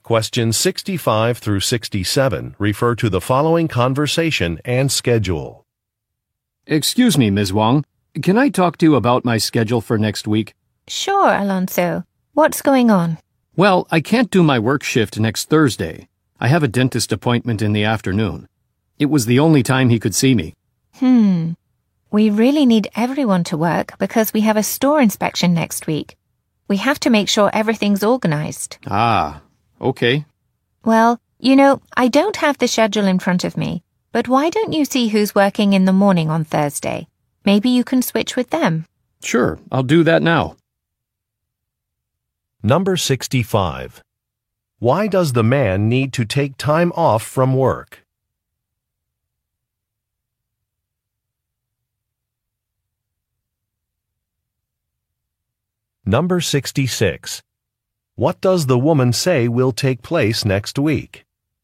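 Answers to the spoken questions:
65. He has a dentist appointment.
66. A store inspection.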